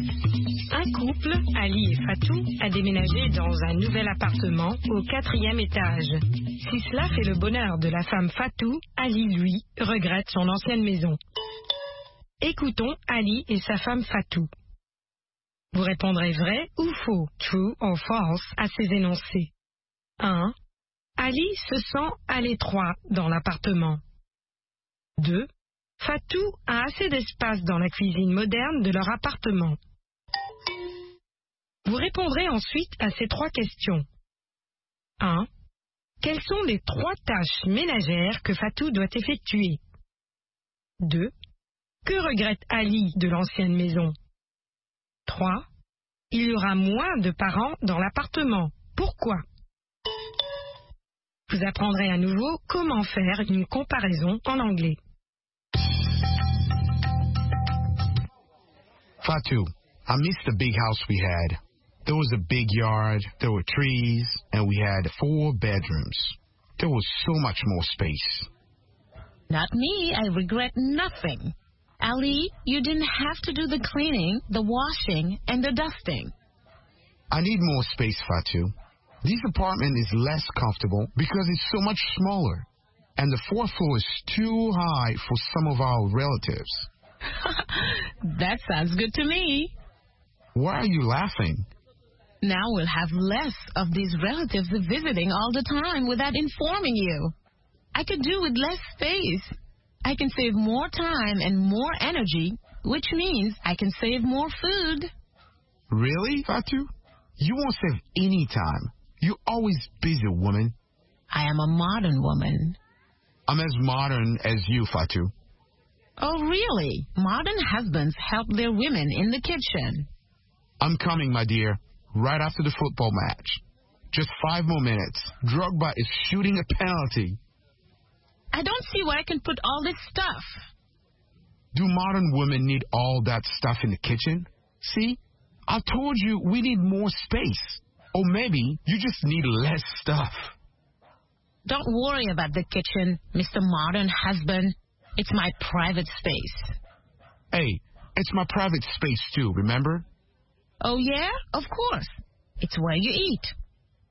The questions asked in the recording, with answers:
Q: Ali se sent à l'étroit dans l'appartement.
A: L'énoncé 1 est vrai. Ali se sent à l'étroit dans l'appartement.

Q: Fatou a assez d'espace dans la cuisine moderne de leur appartement.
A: L'énoncé 2 est faux. Fatou a assez d'espace dans la cuisine moderne de leur appartement.

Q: Quelles sont les trois tâches ménagères que Fatou doit effectuer?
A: Le ménage, la lessive et l'époustage.

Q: Que regrette Ali de l'ancienne maison?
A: La cour, les arbres, les quatre chambres et l'espace.

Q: Il y aura moins de parents dans l'appartement. Pourquoi?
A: Parce qu'il sera plus difficile de monter au quatrième étage.